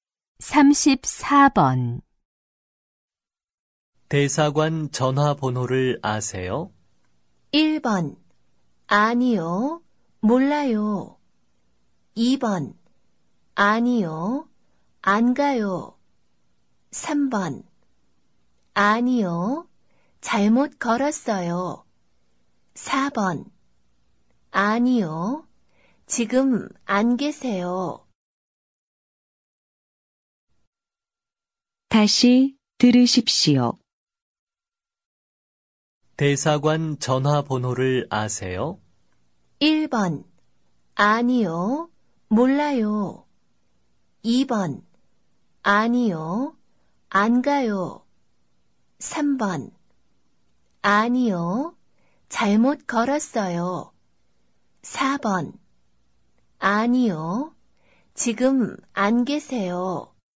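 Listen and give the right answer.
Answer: 1: 아니요, 몰라요.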